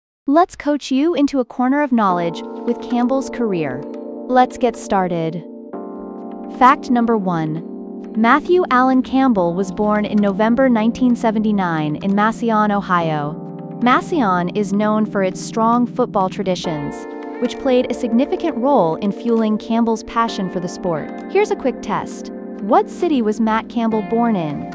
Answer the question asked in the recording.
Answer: Correct answer, Massillon, Ohio.